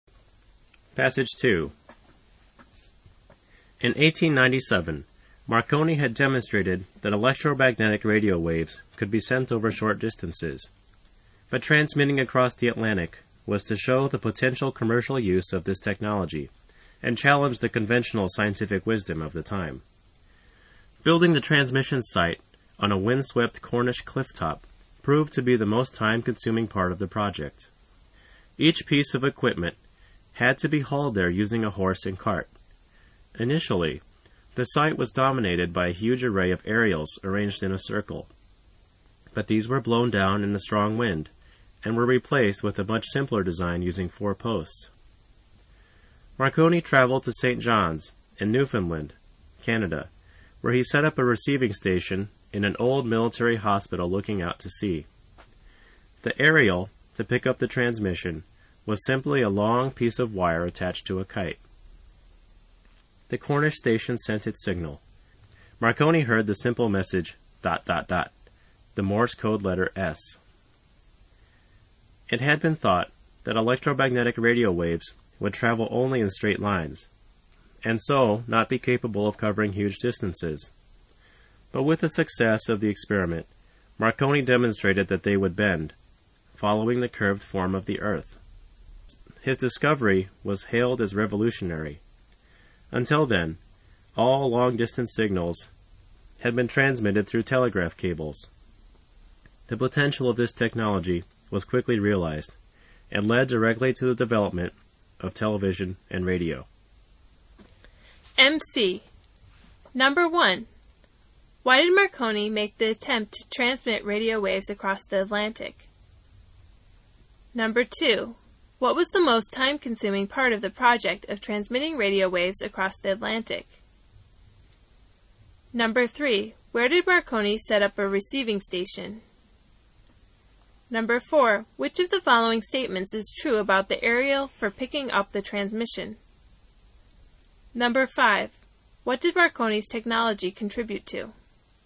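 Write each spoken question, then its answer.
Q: Why did Marconi make the attempt to transmit radio waves across the Atlantic?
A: To show the potential commercial use of the technology and challenge conventional scientific wisdom

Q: What was the most time-consuming part of the project of transmitting radio waves across the Atlantic?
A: Building the transmission site on a Cornish clifftop

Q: Where did Marconi set up a receiving station?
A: In an old military hospital in St. John's, Newfoundland

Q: What did Marconi's technology contribute to?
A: The development of television and radio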